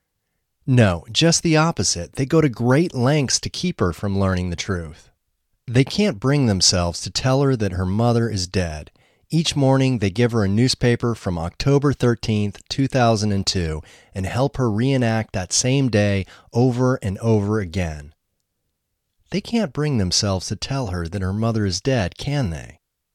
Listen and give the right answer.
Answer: No, they can't bring themselves to tell her that her mother is dead.